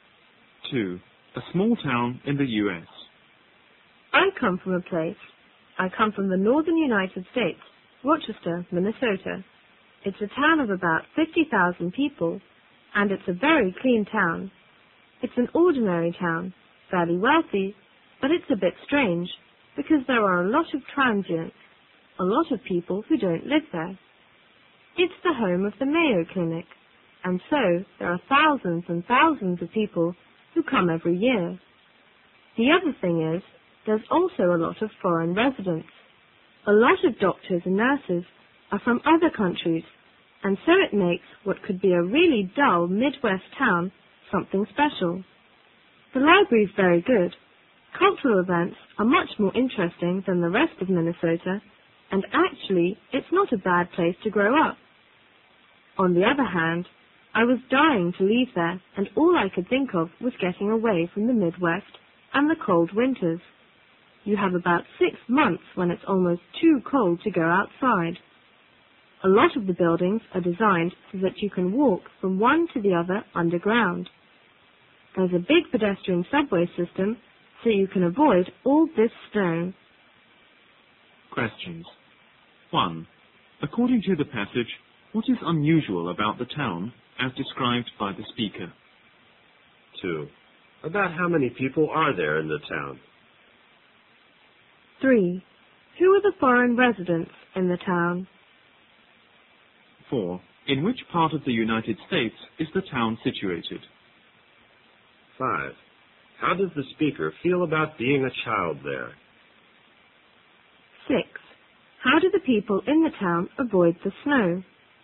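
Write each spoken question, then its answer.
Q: According to the passage, what is unusual about the town as described by the speaker?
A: It has many transients (visitors to the Mayo Clinic) and many foreign residents

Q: About how many people are there in the town?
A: About 50,000

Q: Who are the foreign residents in the town?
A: Doctors and nurses from other countries

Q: In which part of the United States is the town situated?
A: The northern part (the Midwest), in Minnesota

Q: How does the speaker feel about being a child there?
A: It was not a bad place to grow up, but he was dying to leave

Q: How do the people in the town avoid the snow?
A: By walking between buildings through an underground pedestrian subway system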